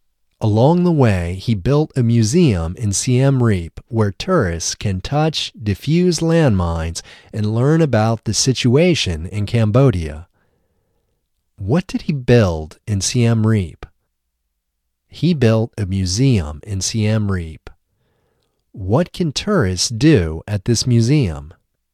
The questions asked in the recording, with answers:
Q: What did he build in Siem Reap?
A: He built a museum in Siem Reap.